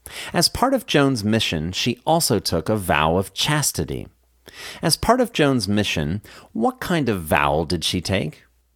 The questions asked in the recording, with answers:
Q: As part of Joan's mission, what kind of vow did she take?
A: As part of Joan's mission, she took a vow of chastity.